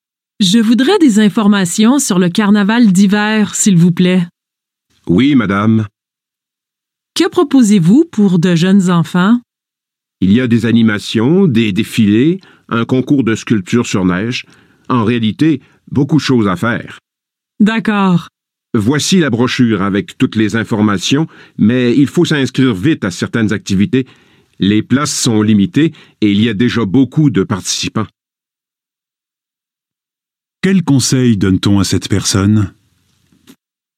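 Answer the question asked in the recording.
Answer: S'inscrire vite à certaines activités, car les places sont limitées.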